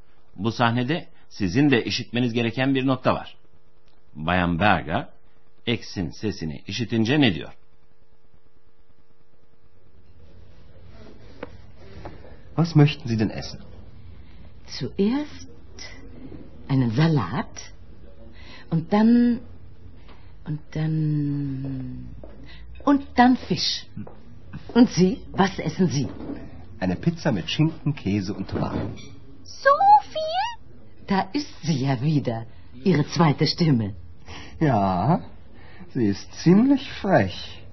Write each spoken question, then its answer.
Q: Bayan Berger X'in sesini işitince ne diyor?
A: Şaka yollu Andreas'ın ikinci sesi diye adlandırdı.